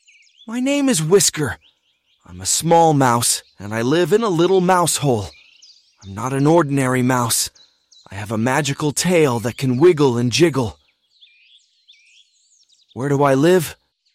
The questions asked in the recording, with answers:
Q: Where do I live?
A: In a little mouse hole. I live in a little mouse hole.